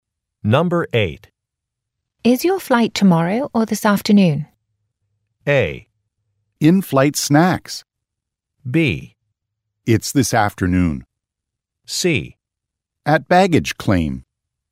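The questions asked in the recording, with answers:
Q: Is your flight tomorrow or this afternoon?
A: B: It's this afternoon.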